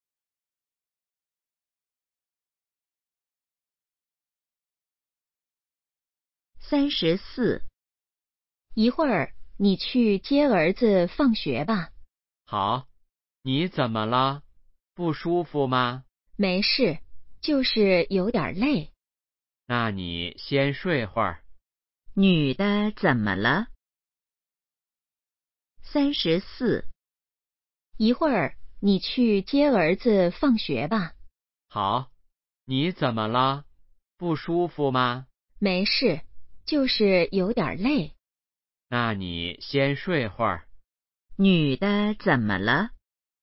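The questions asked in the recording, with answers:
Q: 女的怎么了?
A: 有点累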